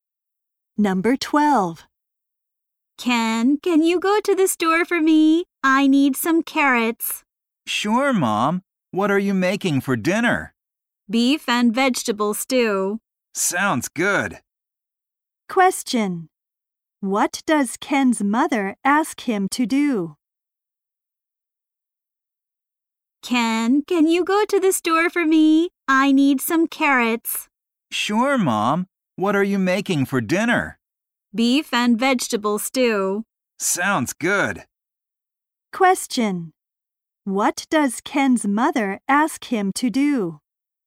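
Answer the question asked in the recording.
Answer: Go to the store (to buy carrots)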